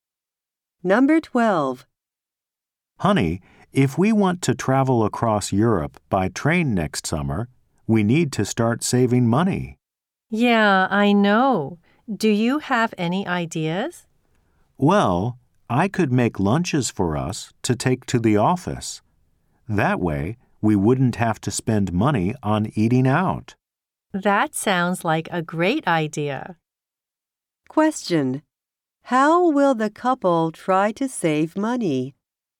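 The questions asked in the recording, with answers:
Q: How will the couple try to save money?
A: By taking homemade lunches to the office instead of eating out.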